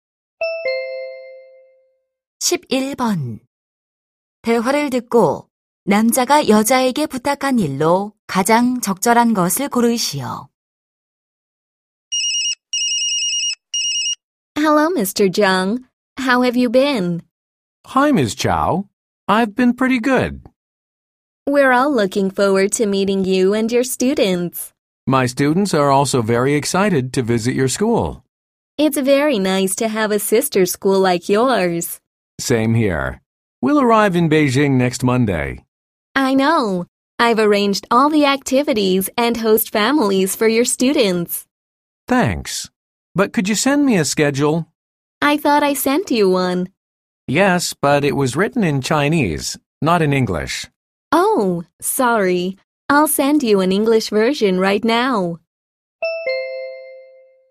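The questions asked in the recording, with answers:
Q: 대화를 듣고 남자가 여자에게 부탁한 일로 가장 적절한 것을 고르시오.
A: 영어로 된 일정표 보내주기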